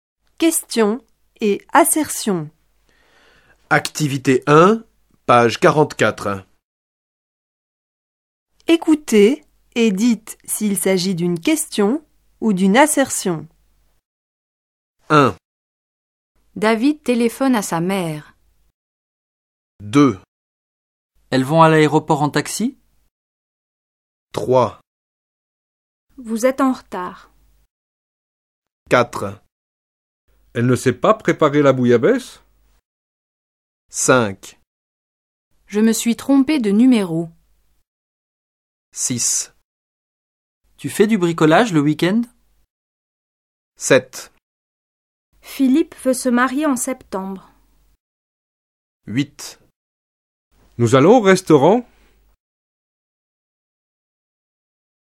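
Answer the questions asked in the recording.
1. assertion
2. question
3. assertion
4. question
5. assertion
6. question
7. assertion
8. question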